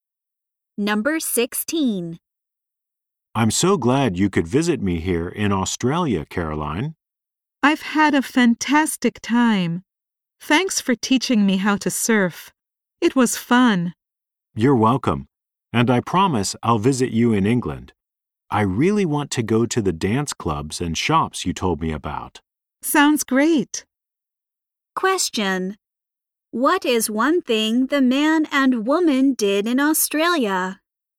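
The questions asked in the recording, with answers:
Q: What is one thing the man and woman did in Australia?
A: They went surfing.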